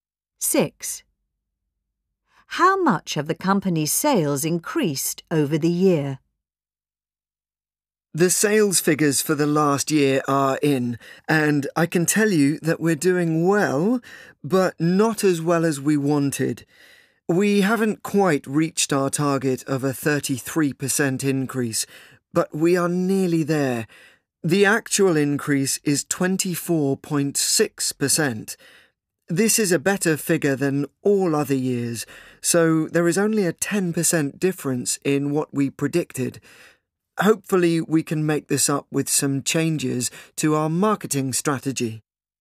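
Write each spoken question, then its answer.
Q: How much have the company's sales increased over the year?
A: 24.6%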